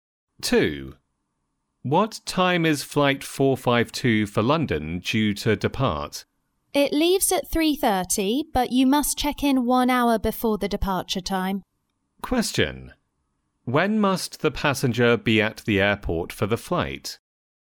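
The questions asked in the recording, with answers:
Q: When must the passenger be at the airport for the flight?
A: By 2:30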